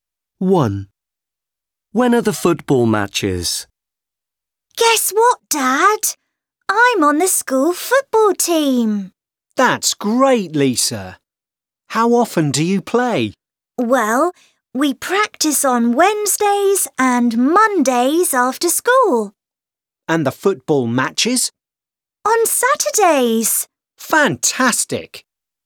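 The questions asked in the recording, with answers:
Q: When are the football matches?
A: On Saturdays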